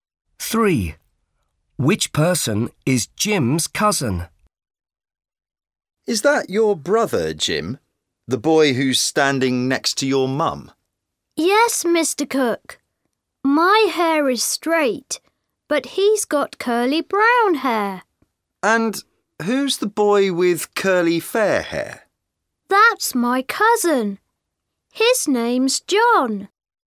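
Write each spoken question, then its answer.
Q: Which person is Jim's cousin?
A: The boy with curly fair hair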